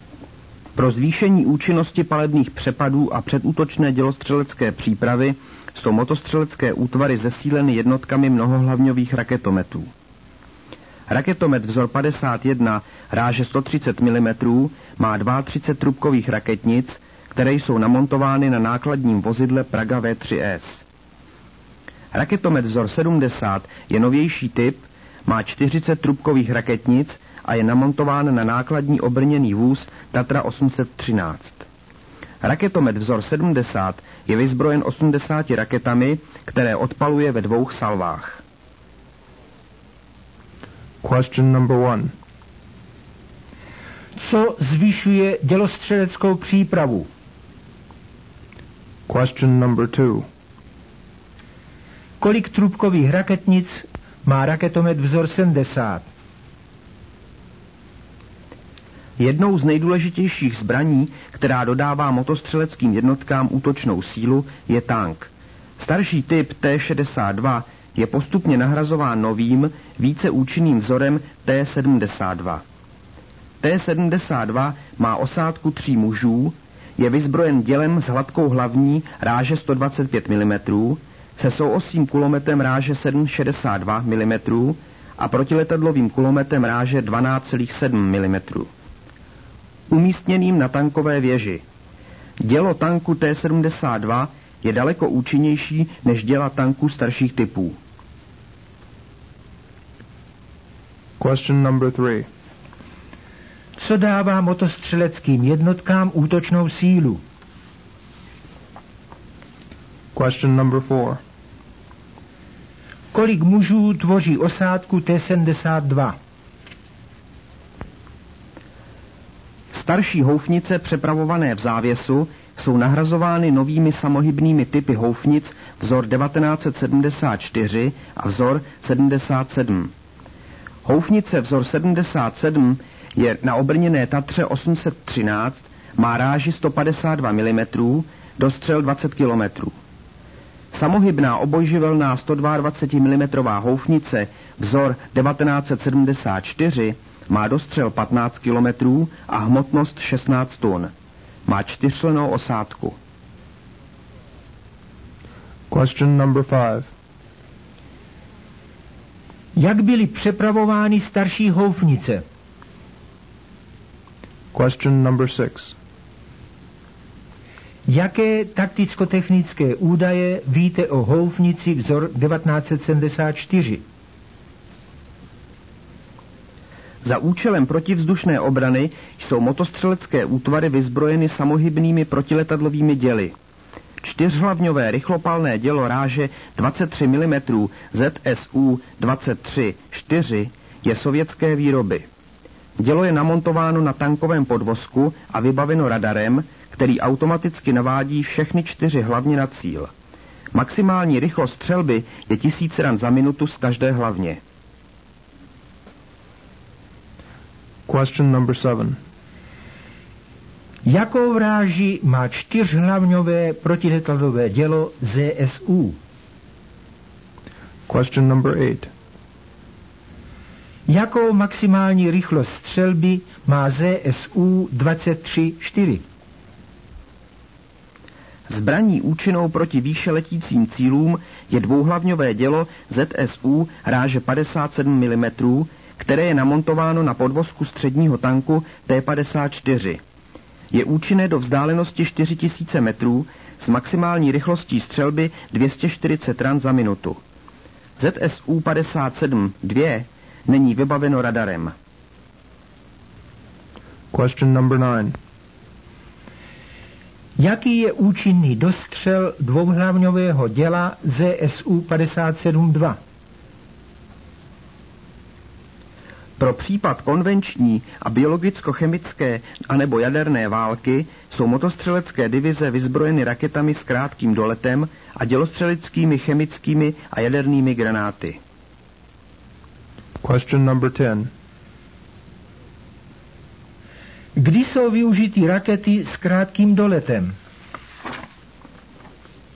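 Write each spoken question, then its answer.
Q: Co zvyšuje dělostřeleckou přípravu?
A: Jednotky mnohohlavňových raketometů

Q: Kolik trubkových raketnic má raketomet vzor 70?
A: 40

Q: Co dává motostřeleckým jednotkám útočnou sílu?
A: Tank

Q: Kolik mužů tvoří osádku T-72?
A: Tři muži

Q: Jak byly přepravovány starší houfnice?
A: V závěsu (tažené)

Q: Jaké takticko-technické údaje víte o houfnici vzor 1974?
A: Samohybná obojživelná, ráže 122 mm, dostřel 15 km, hmotnost 16 tun, čtyřčlenná osádka

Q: Jakou vráži má čtyřhlavňové protiletadlové dělo ZSU?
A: 23 mm

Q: Jakou maximální rychlost střelby má ZSU 23-4?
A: 1000 ran za minutu z každé hlavně

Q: Jaký je účinný dostřel dvouhlavňového děla ZSU 57-2?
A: 4000 metrů

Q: Kdy jsou využity rakety s krátkým doletem?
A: V případě konvenční, biologicko-chemické nebo jaderné války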